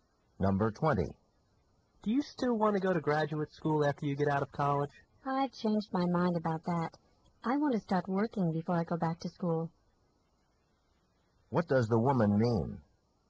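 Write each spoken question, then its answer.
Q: What does the woman mean?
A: She wants to work before going to graduate school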